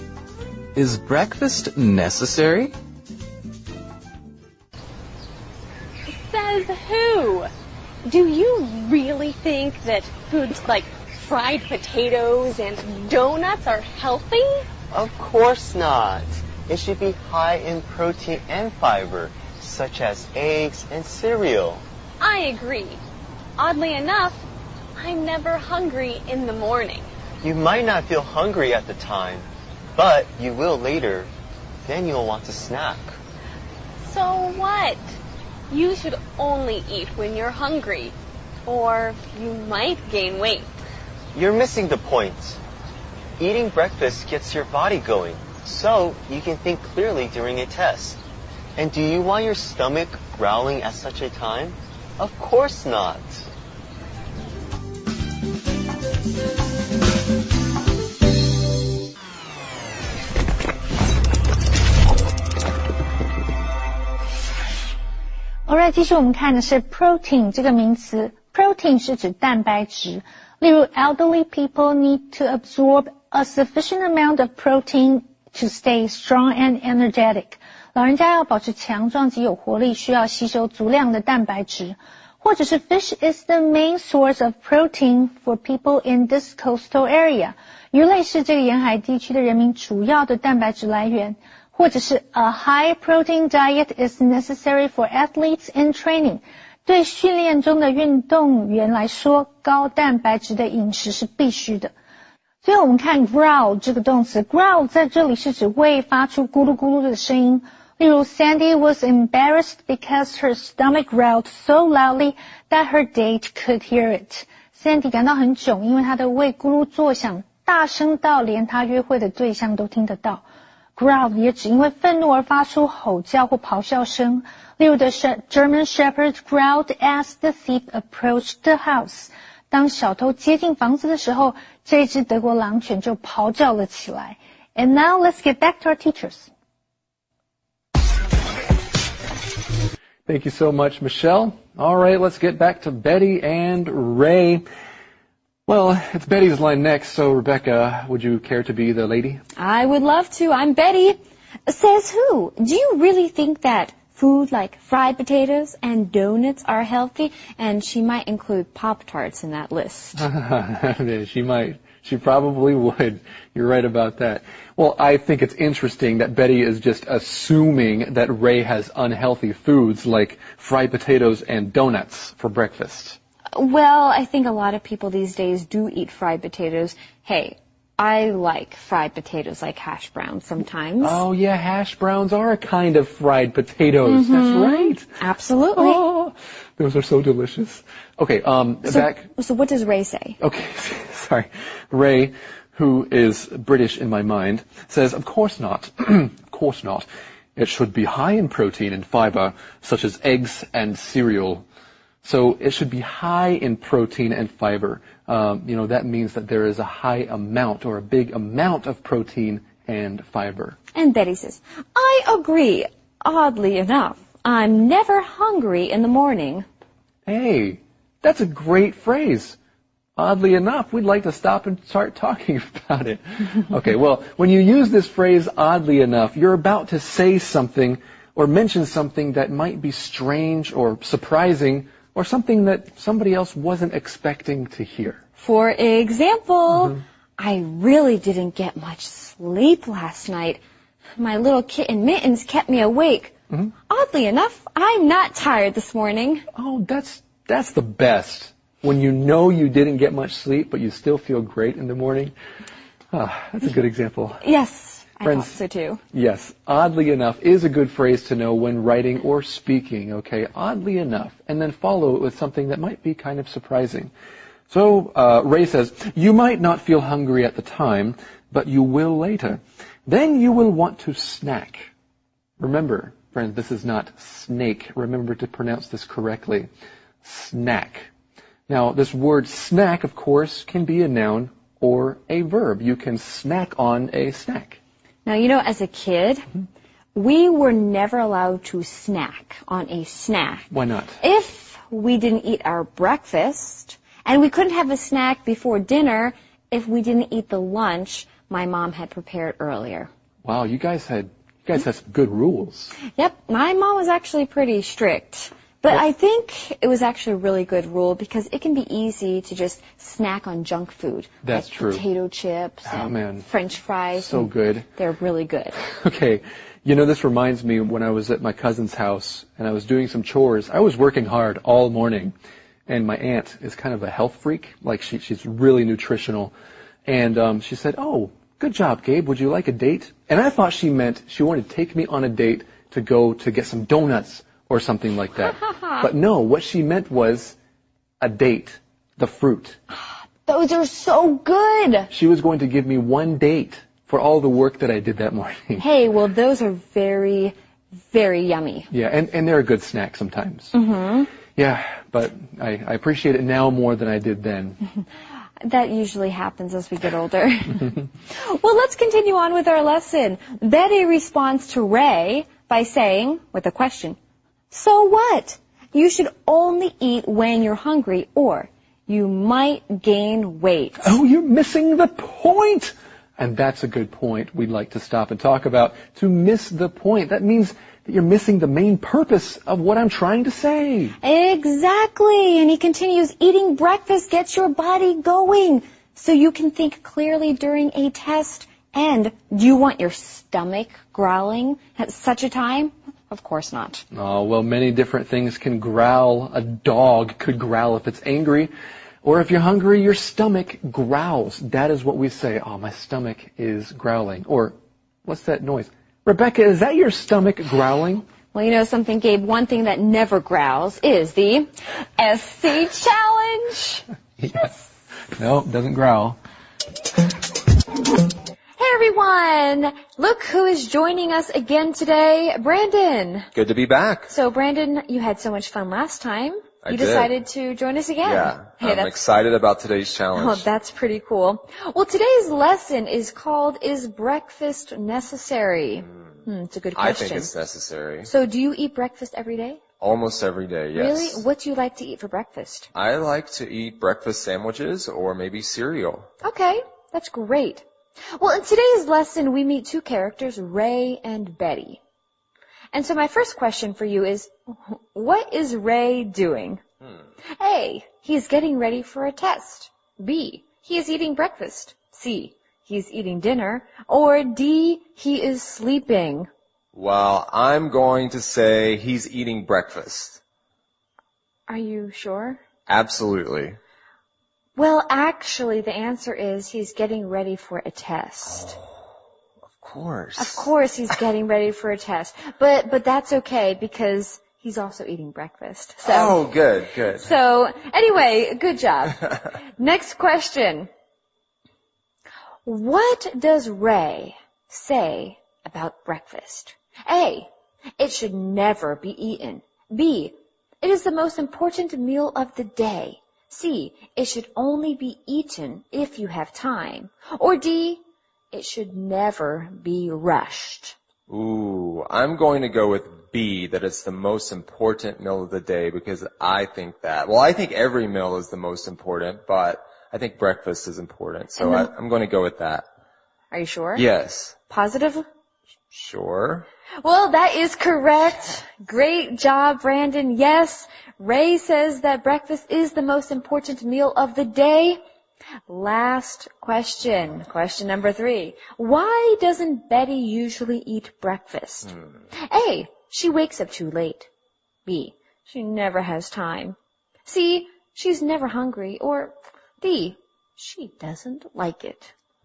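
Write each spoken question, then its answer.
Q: what is Ray doing?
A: A: he's getting ready for a test

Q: What does Ray say about breakfast?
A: B: it is the most important meal of the day

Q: Why doesn't Betty usually eat breakfast?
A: According to our lesson, it's because she's never hungry.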